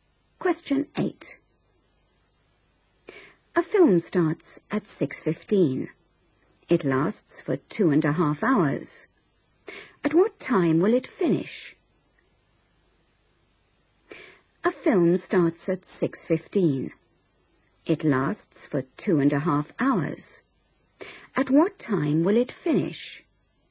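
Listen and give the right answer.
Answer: 8:45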